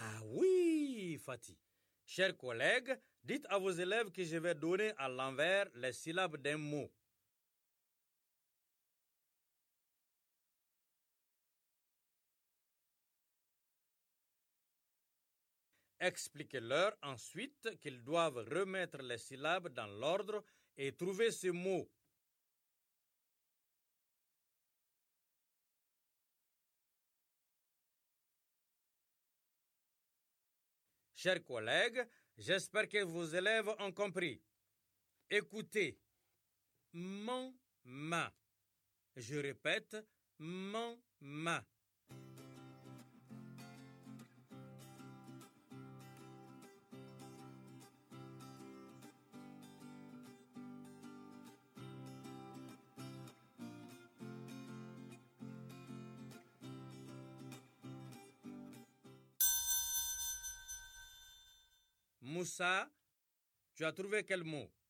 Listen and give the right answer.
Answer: Monsieur, c'est maman.